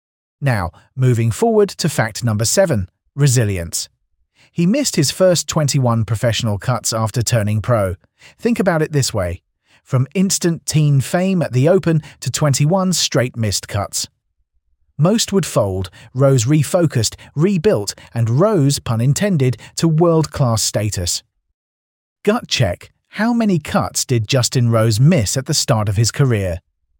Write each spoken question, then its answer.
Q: how many cuts did Justin Rose miss at the start of his career?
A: Correct answer, 21.